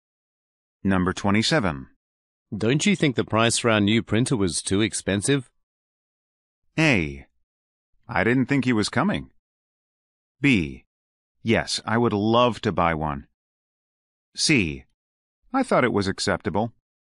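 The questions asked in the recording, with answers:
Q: Don't you think the price for our new printer was too expensive?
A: C: I thought it was acceptable.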